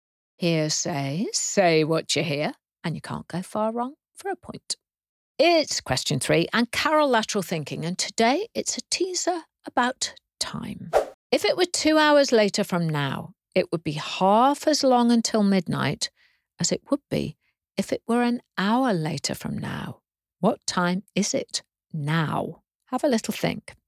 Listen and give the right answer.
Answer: Well, the answer is it's 9 p.m.